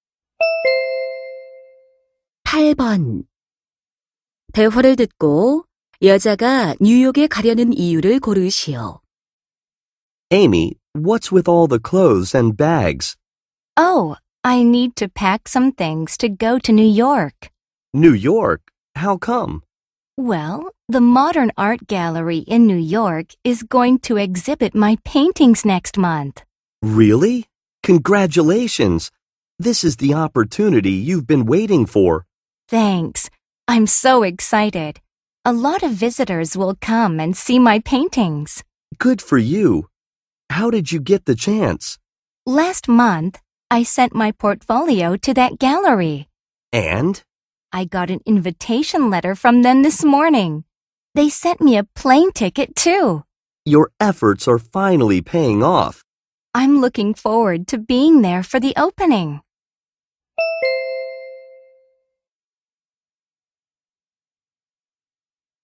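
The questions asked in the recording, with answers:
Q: 대화를 듣고 여자가 뉴욕에 가려는 이유를 고르시오.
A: 자신의 그림 전시회에 참석하려고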